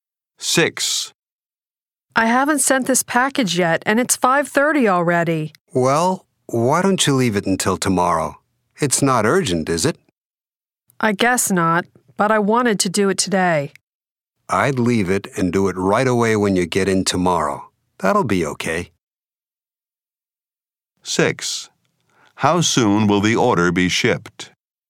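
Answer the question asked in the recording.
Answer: Tomorrow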